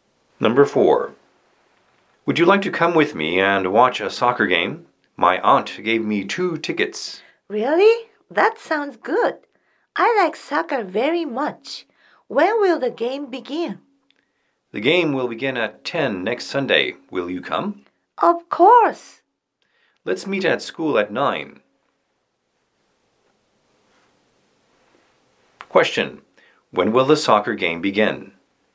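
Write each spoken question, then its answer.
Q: When will the soccer game begin?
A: At 10 next Sunday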